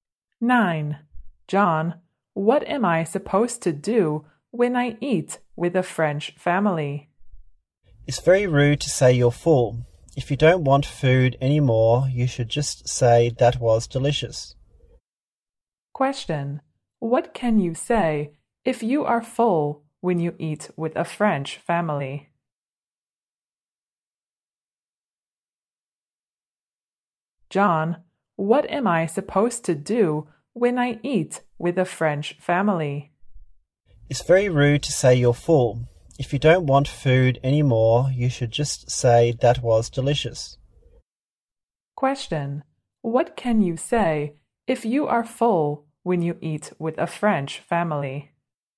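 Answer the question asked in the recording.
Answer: That was delicious.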